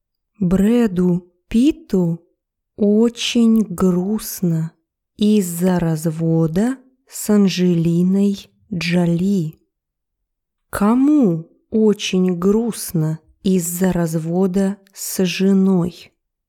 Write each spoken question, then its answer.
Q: Кому очень грустно из-за развода с женой?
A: Брэду Питу.